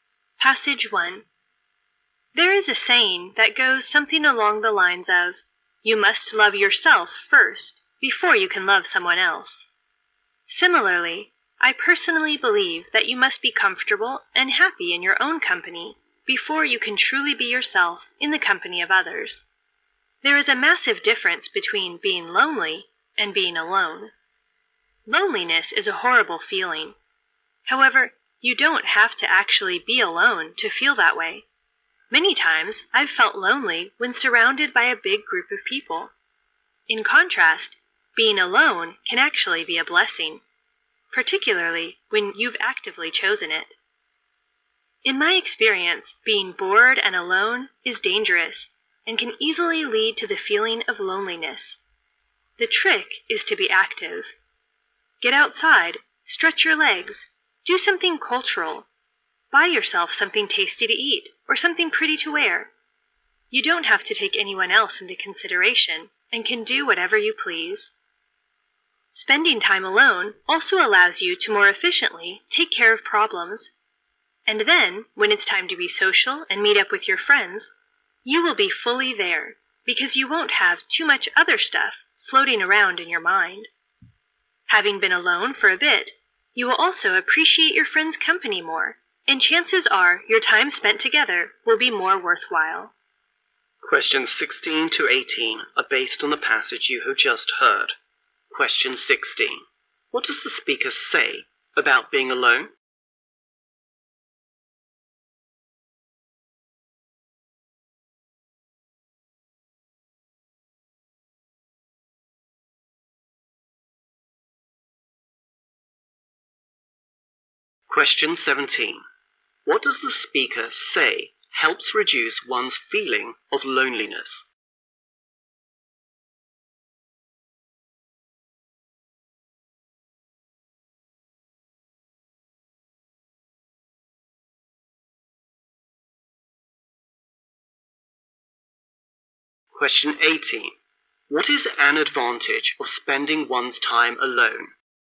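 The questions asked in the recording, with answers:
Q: What does the speaker say about being alone?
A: It can be a blessing, especially when chosen

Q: What does the speaker say helps reduce one's feeling of loneliness?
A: Being active

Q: What is an advantage of spending one's time alone?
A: You can take care of problems more efficiently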